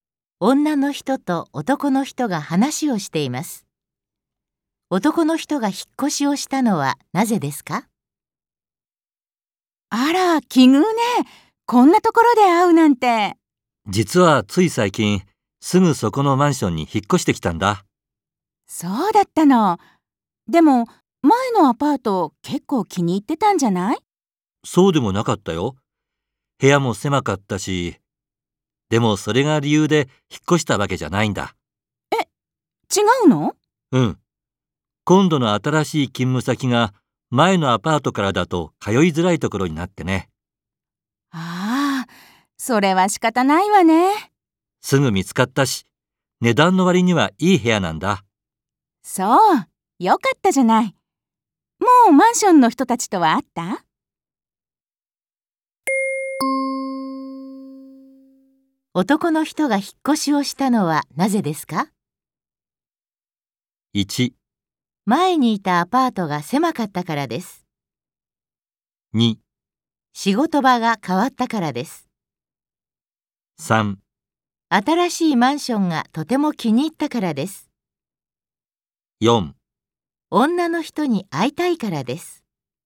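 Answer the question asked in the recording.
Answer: 2: 仕事場が変わったからです。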